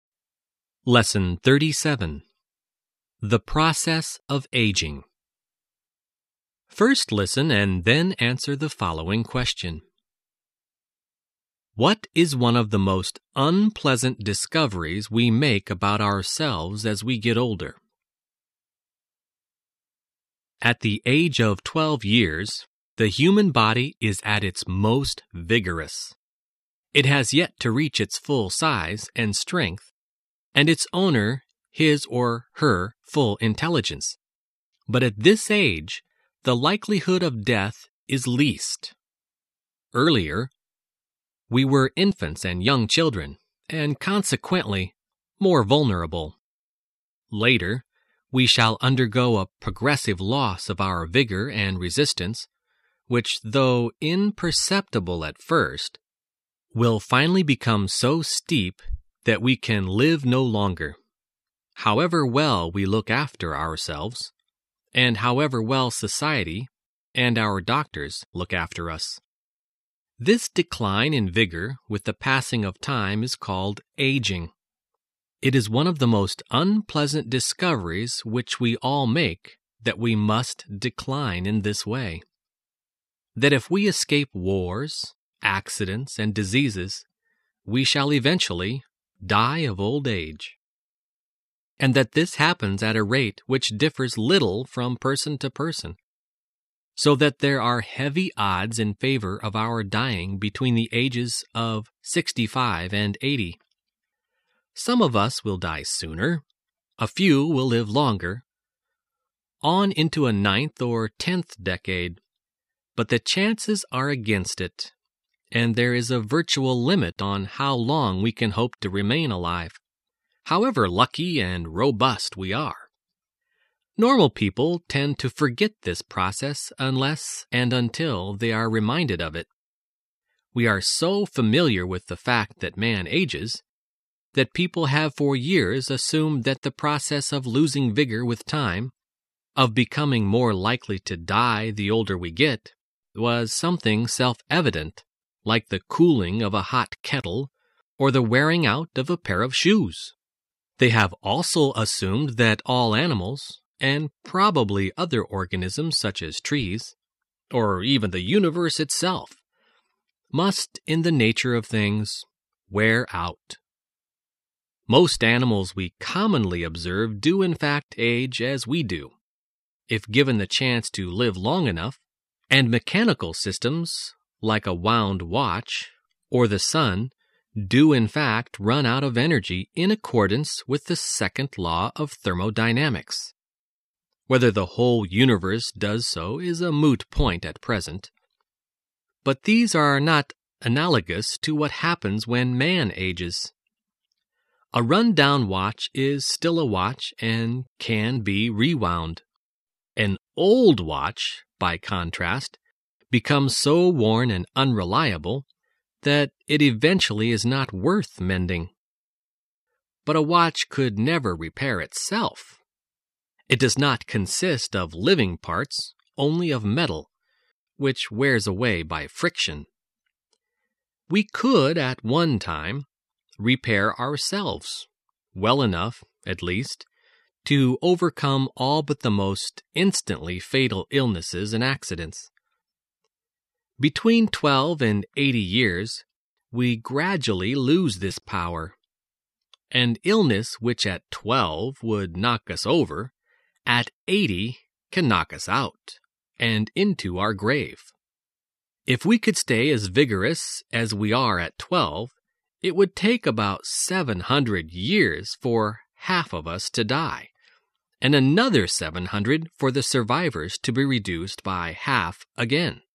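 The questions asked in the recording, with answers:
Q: What is one of the most unpleasant discoveries we make about ourselves as we get older?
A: That we must decline in vigor with age and will eventually die of old age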